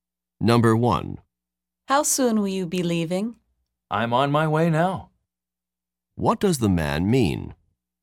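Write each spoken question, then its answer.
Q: What does the man mean?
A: He is leaving right now.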